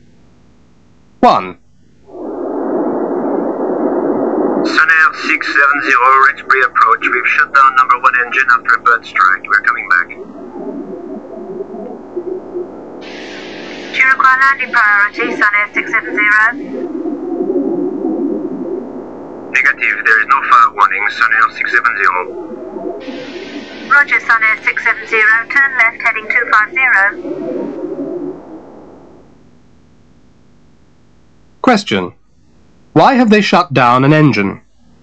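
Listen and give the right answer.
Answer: After a bird strike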